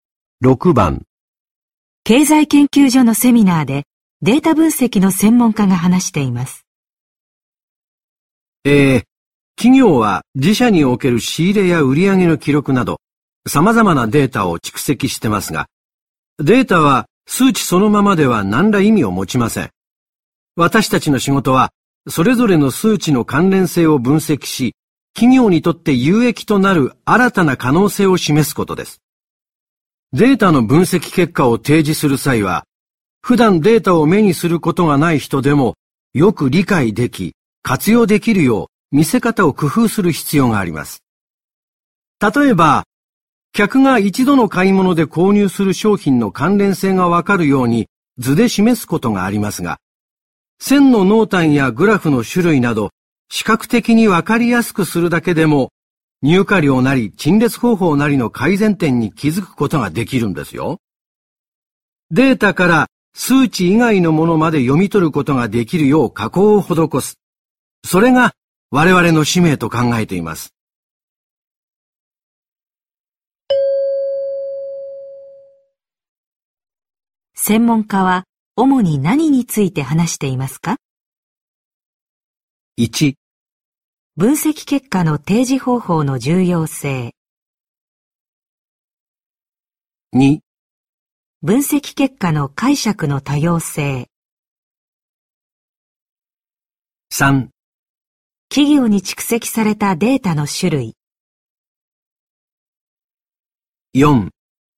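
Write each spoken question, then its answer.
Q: 専門家は主に何について話していますか?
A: 1: 分析結果の提示方法の重要性。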